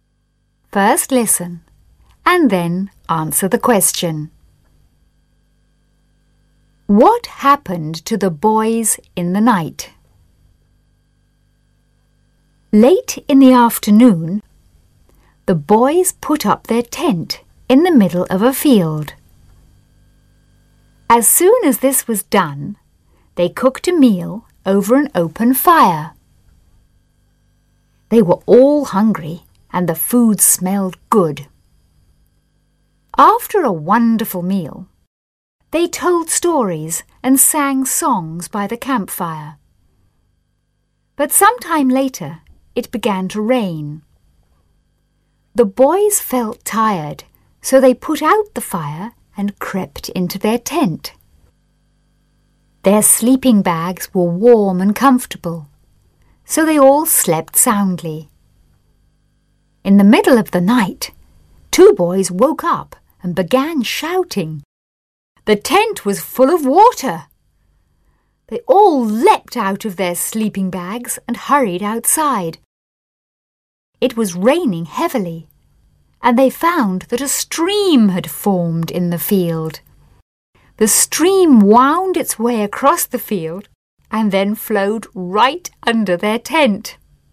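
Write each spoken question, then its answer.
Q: What happened to the boys in the night?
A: A stream formed in the field and flowed under their tent, filling it with water.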